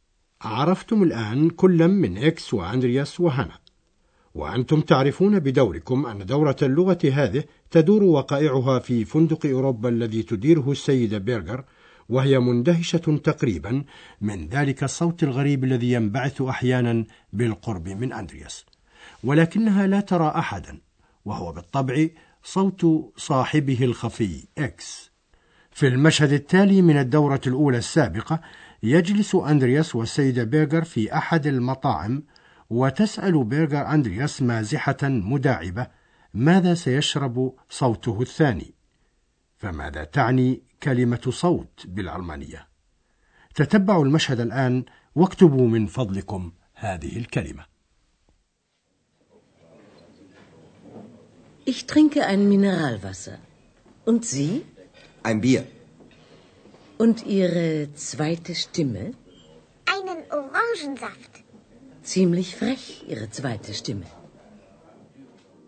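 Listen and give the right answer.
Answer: Stimme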